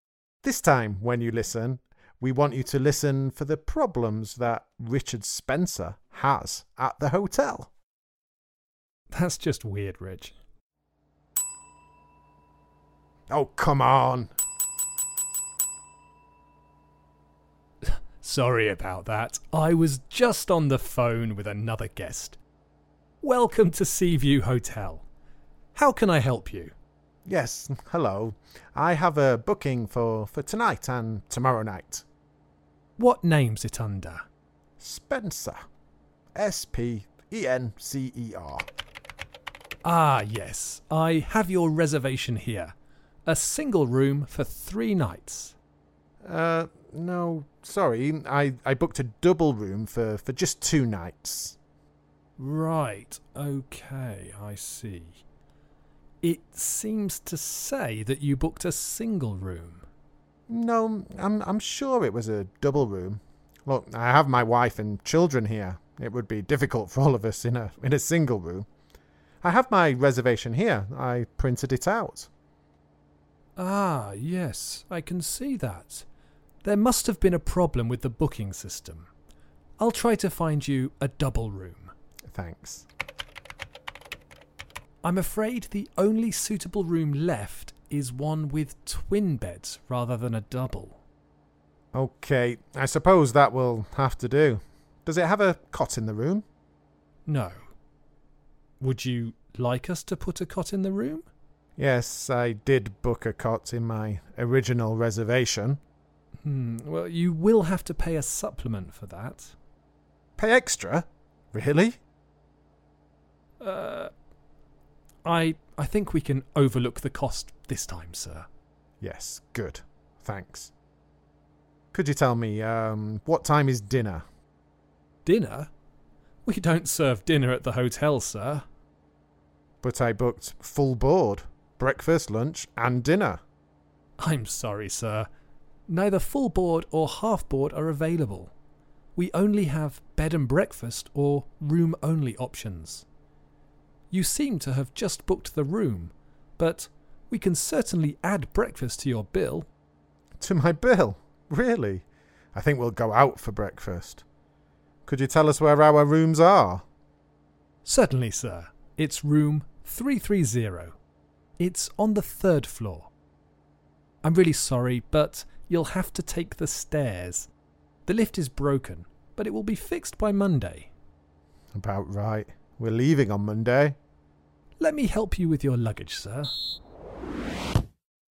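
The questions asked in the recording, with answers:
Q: This time, when you listen, we want you to listen for the problems that Richard Spencer has at the hotel.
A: Wrong booking (single room for 3 nights instead of double for 2), only twin beds left, no cot and a charge for one, no dinner or full board (room only), and the lift is broken so they must take the stairs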